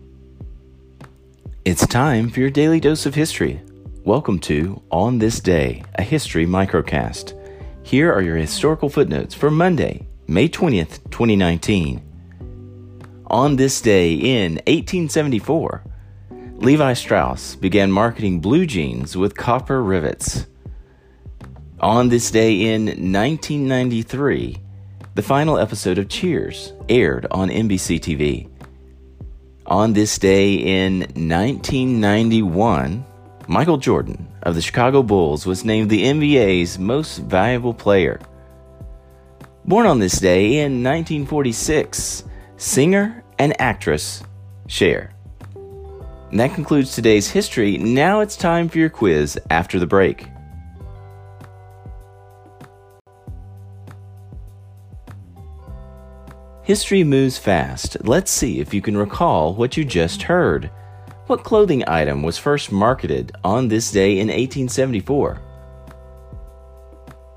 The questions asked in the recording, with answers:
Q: What clothing item was first marketed on this day in 1874?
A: Levi Strauss's blue jeans with copper rivets.